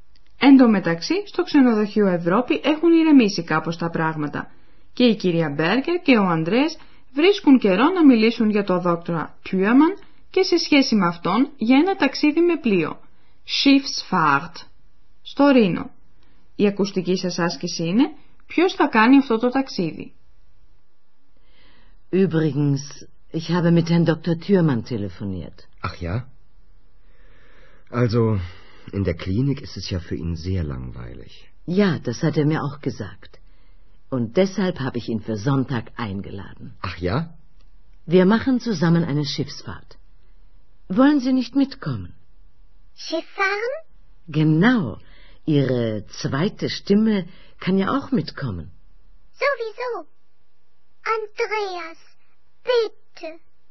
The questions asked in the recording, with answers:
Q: Η ακουστική σας άσκηση είναι ποιος θα κάνει αυτό το ταξίδι.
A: Η κυρία Μπέργκερ προσκάλεσε τον δόκτορα Τιούαμαν να κάνουν ένα ταξίδι με πλοίο.